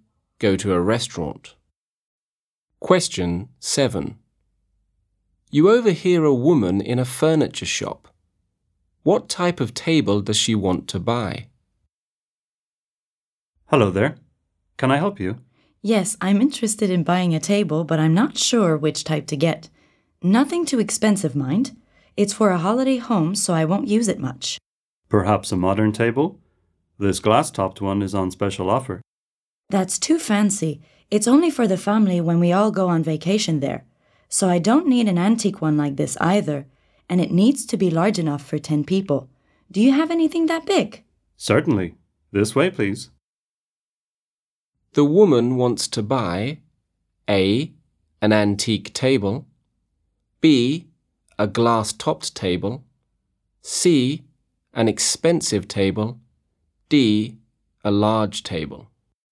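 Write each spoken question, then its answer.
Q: What type of table does she want to buy?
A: D: a large table.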